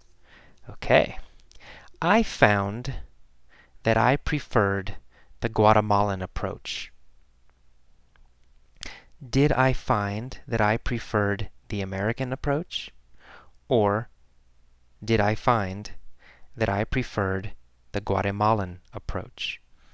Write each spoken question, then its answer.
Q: Or did I find that I preferred the Guatemalan approach?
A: Well, the Guatemalan approach.